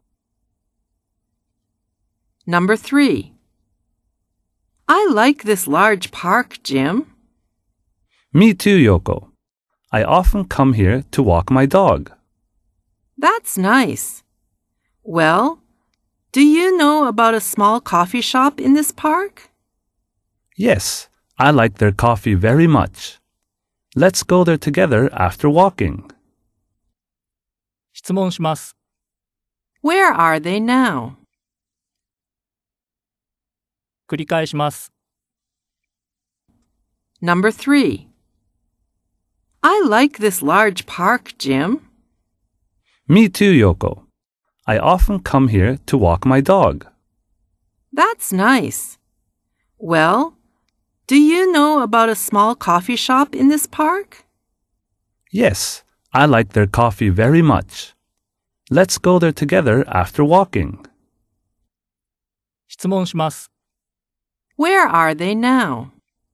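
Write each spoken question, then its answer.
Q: Where are they now?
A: In a large park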